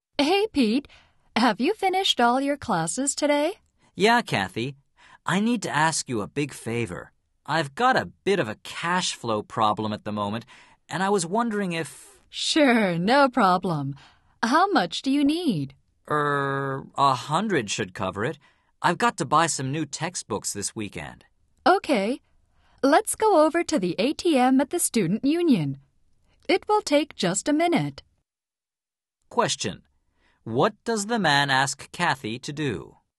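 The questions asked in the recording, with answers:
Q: What does the man ask Kathy to do?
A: Lend him some money (100) for textbooks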